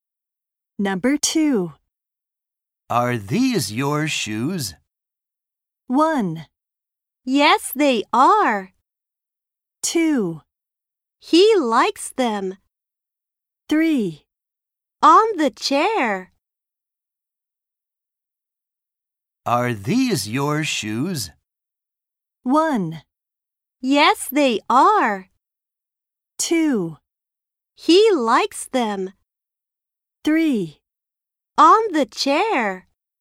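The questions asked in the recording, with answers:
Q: Are these your shoes?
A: 1: Yes, they are.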